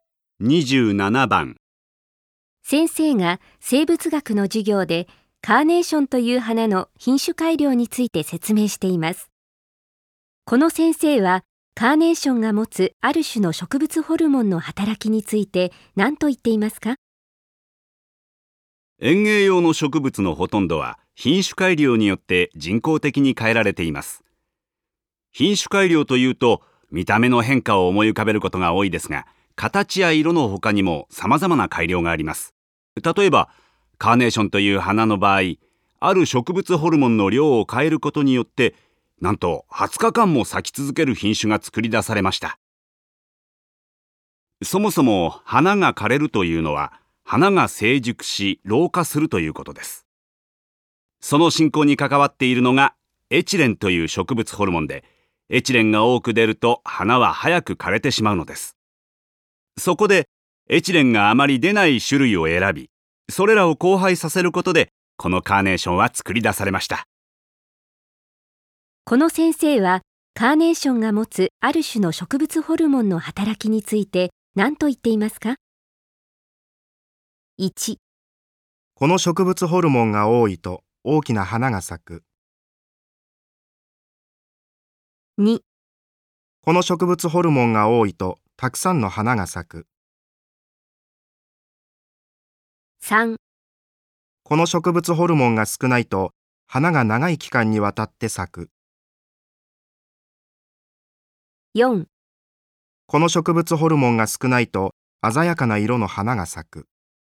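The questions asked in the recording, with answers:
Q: この先生はカーネーションが持つある種の植物ホルモンの働きについて何と言っていますか?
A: 3: この植物ホルモンが少ないと花が長い期間にわたって咲く。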